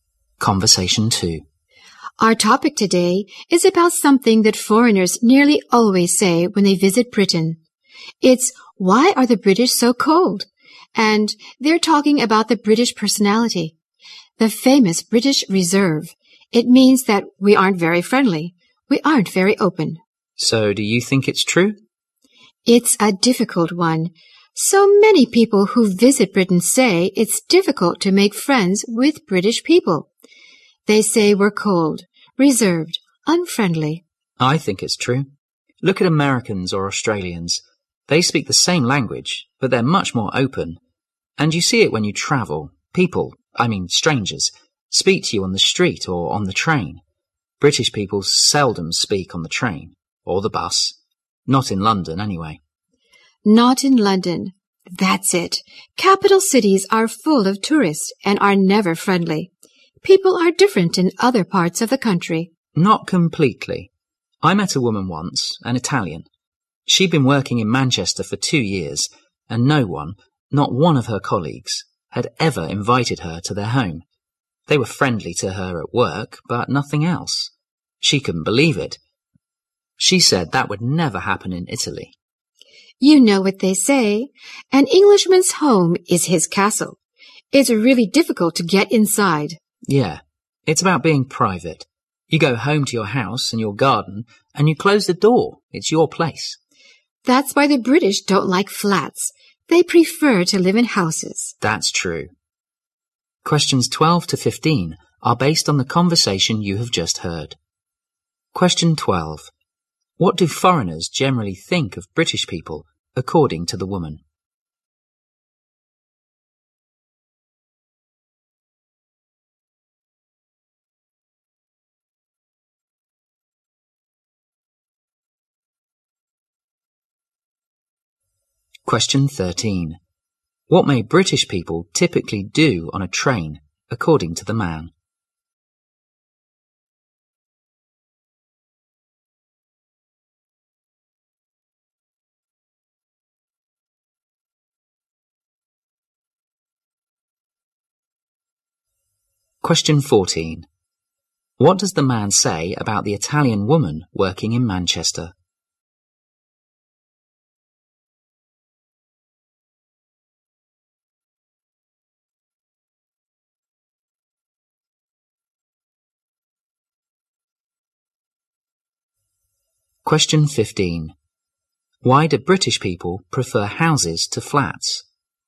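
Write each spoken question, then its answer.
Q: What do foreigners generally think of British people, according to the woman?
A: They are cold, reserved and unfriendly

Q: What may British people typically do on a train, according to the man?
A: Seldom speak to others

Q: What does the man say about the Italian woman working in Manchester?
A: None of her colleagues invited her to their home in 2 years

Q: Why do British people prefer houses to flats?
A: They value privacy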